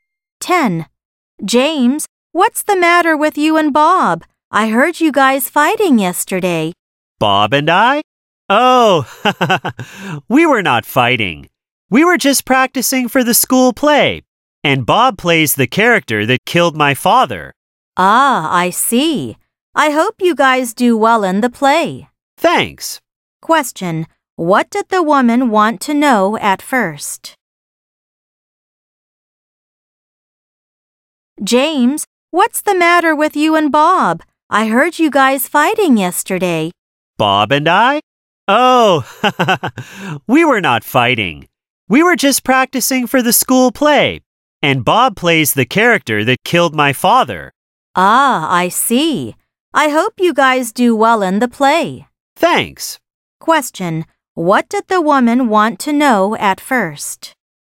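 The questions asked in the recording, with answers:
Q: what did the woman want to know at first?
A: Why James and Bob were fighting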